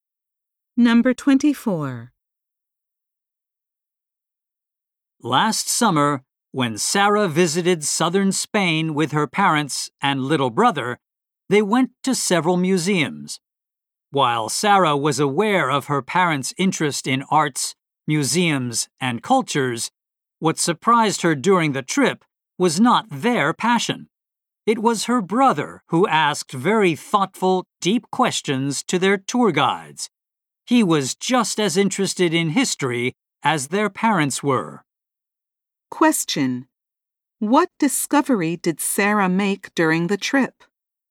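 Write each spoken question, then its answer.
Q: What discovery did Sarah make during the trip?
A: Her brother was as interested in history as their parents.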